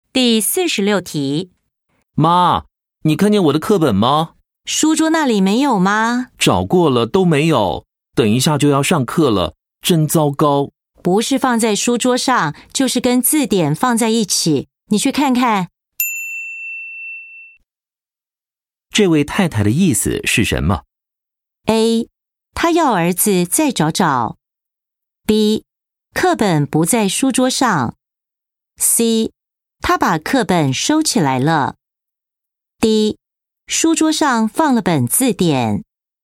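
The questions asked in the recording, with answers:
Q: 这位太太的意思是什么?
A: A: 她要儿子再找找。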